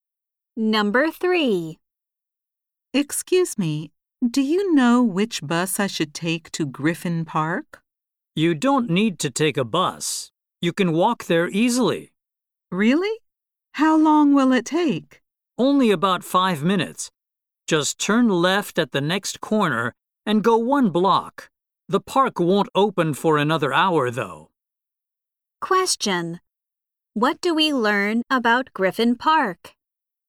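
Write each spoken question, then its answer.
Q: What do we learn about Griffin Park?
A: It is close by and is not open yet.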